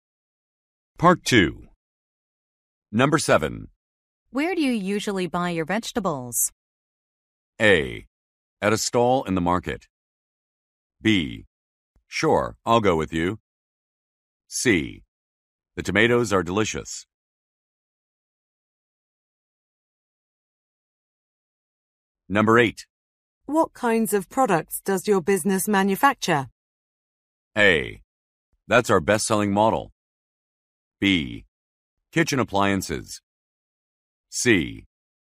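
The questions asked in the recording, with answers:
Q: Where do you usually buy your vegetables?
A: A: At a stall in the market.

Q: What kinds of products does your business manufacture?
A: B: Kitchen appliances.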